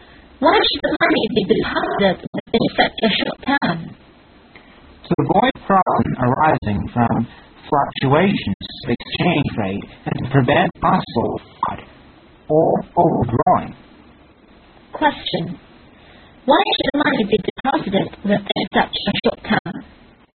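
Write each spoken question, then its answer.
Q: Why should the money be deposited within such a short time?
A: To avoid problems from exchange rate fluctuations and to prevent possible fraud or overdrawing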